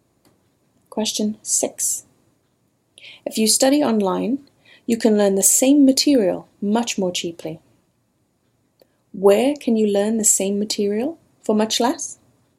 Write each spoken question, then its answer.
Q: Where can you learn the same material for much less?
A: If you study online, you can learn the same material much more cheaply for much less.